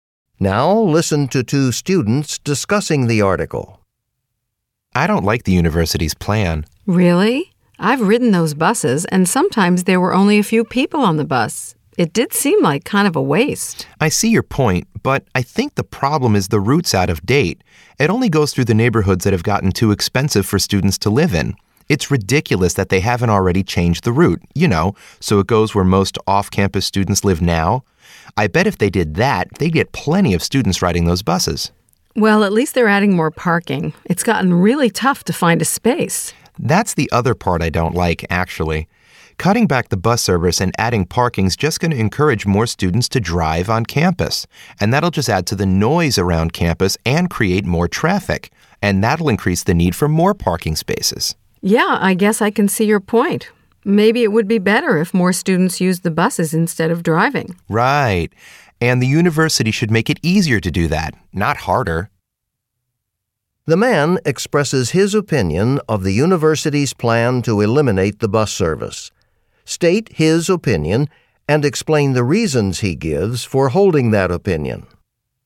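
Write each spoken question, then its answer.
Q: The man expresses his opinion of the university's plan to eliminate the bus service. State his opinion and explain the reasons he gives for holding that opinion.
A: He opposes the plan. Buses are underused only because the route is out of date; it should go where students live now. Cutting buses and adding parking will make more students drive, which means more noise, more traffic and a need for even more parking.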